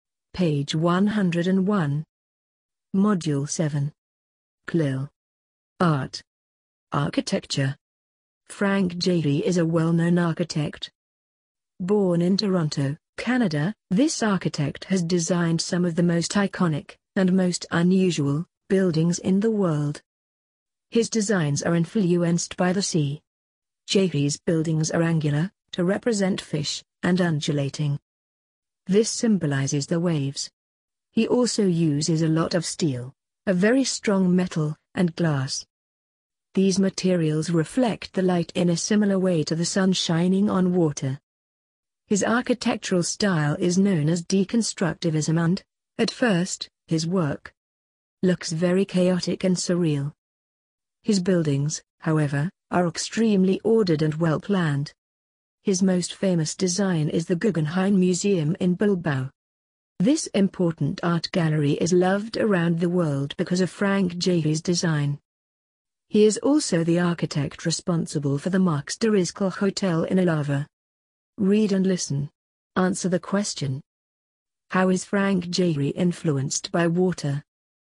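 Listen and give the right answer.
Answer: His designs are influenced by the sea: angular shapes represent fish, undulating shapes symbolize waves, and steel and glass reflect light like sun shining on water.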